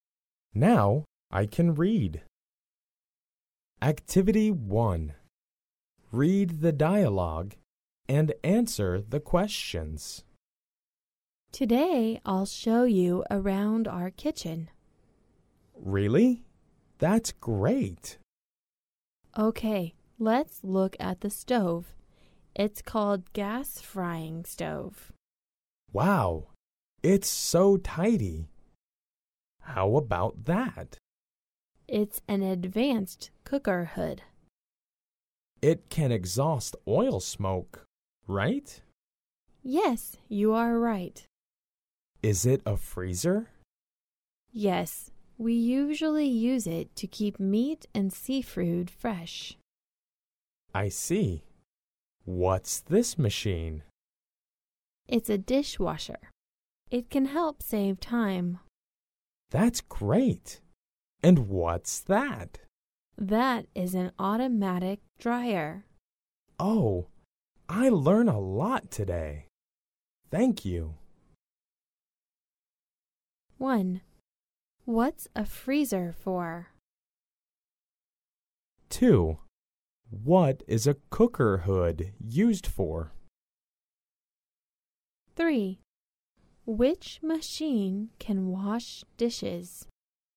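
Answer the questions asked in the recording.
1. To keep meat and seafood fresh
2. To exhaust oil smoke
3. A dishwasher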